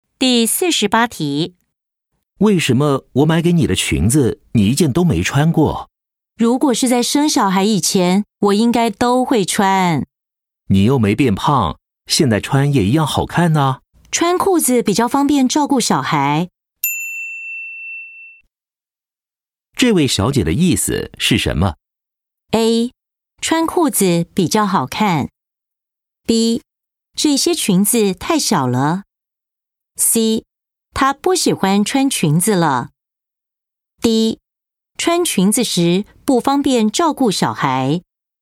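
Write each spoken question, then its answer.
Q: 这位小姐的意思是什么?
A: D: 穿裙子时不方便照顾小孩。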